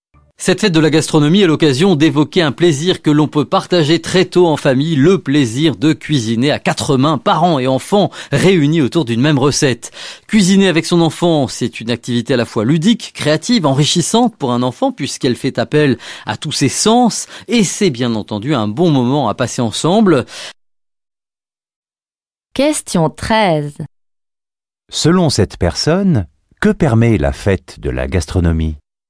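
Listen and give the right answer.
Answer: D'évoquer le plaisir de cuisiner en famille, parents et enfants ensemble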